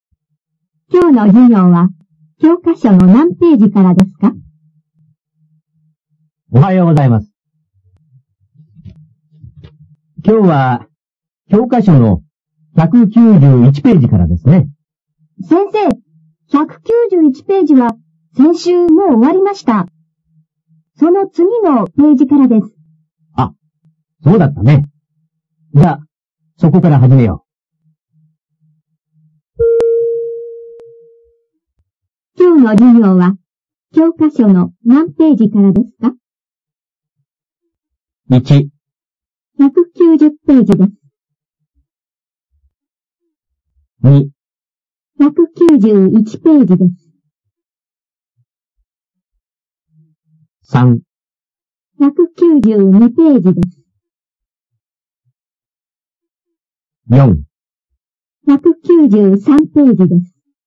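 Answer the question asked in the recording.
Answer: 3: 192ページです。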